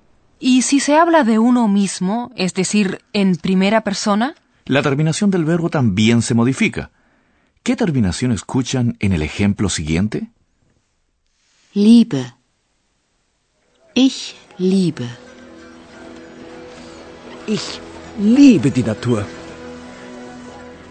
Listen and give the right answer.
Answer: Ah, por lo tanto, al yo le corresponde la terminación e.